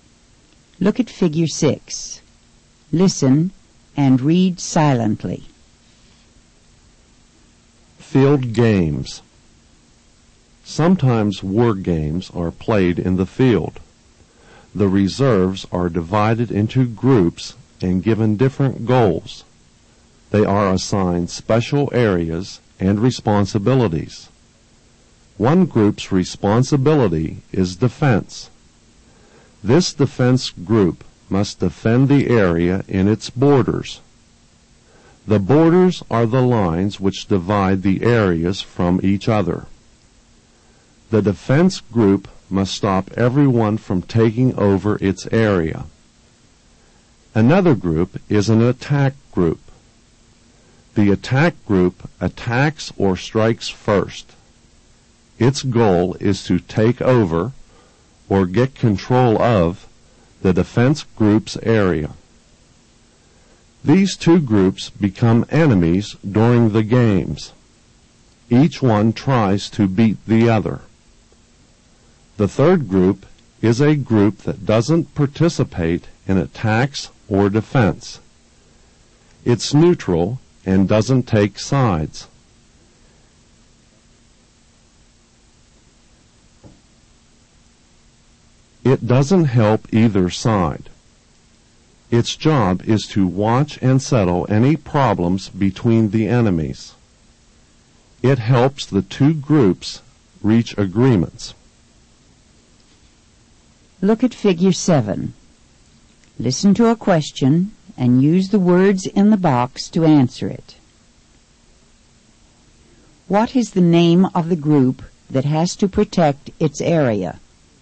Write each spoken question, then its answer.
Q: What is the name of the group that has to protect its area?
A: A defense group.